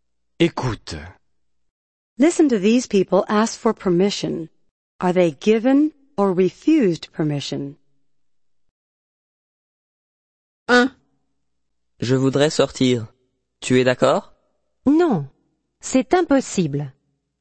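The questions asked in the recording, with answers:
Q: Are they given or refused permission?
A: Refused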